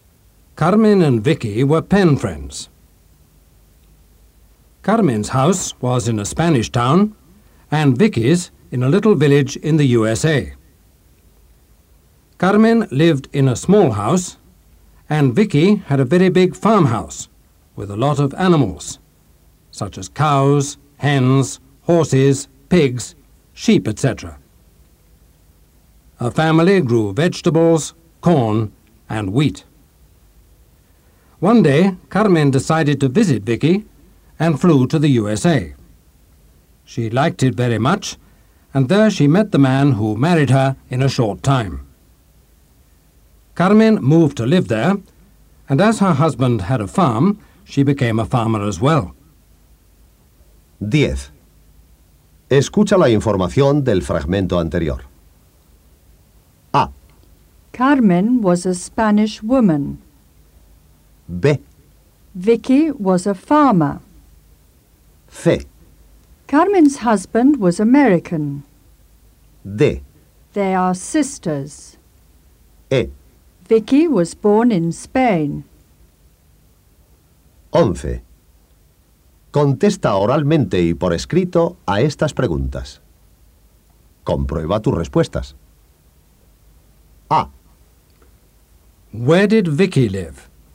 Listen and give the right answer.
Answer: She lived in the USA.